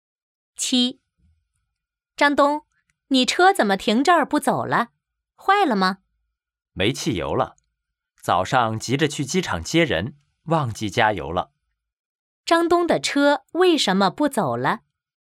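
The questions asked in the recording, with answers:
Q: 张东的车为什么不走了?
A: 没汽油了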